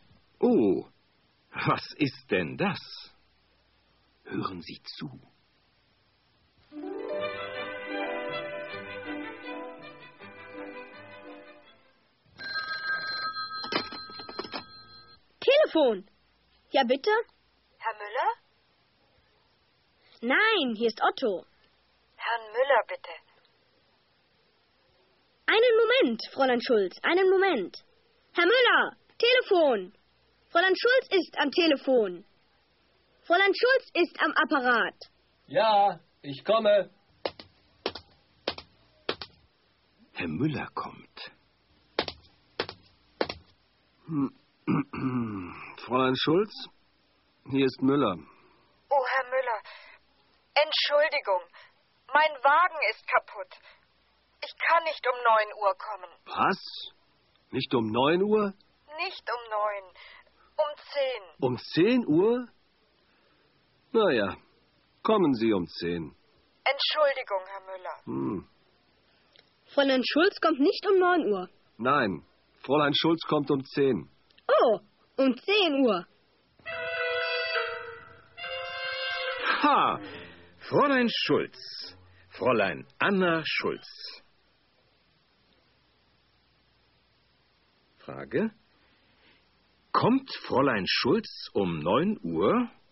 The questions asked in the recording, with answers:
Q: Kommt Fräulein Schulz um 9 Uhr?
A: Nein, Fräulein Schulz? Nein, sie kommt nicht um 9 Uhr.